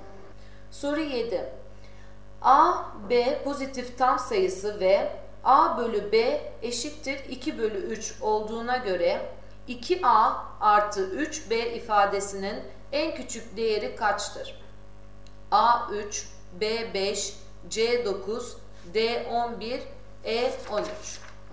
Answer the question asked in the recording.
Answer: Doğru cevap E 13.